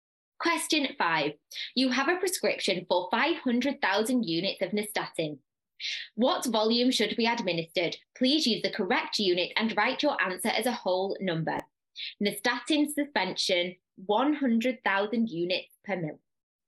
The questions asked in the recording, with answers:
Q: What volume should be administered?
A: that should give you 5 mil